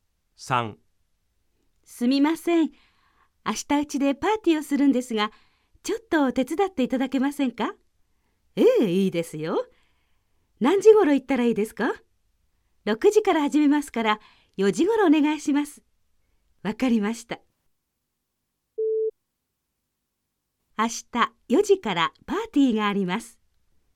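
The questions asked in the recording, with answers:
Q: 明日4時からパーティーがあります。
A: ×(正しくない)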